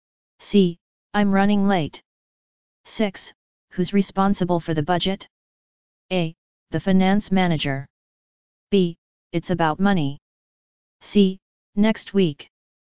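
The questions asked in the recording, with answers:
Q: Who's responsible for the budget?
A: A: The finance manager.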